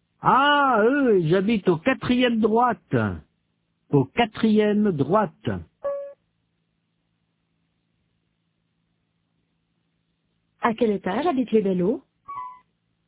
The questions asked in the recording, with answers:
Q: À quel étage habitent les Bello ?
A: Au quatrième.